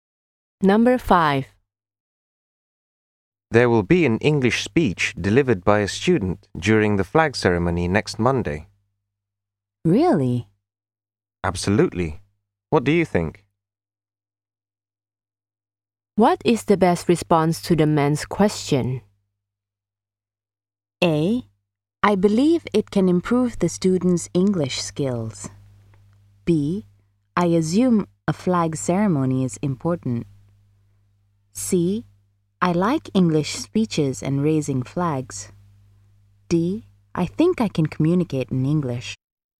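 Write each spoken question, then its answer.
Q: What is the best response to the man's question?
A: A: I believe it can improve the student's English skills.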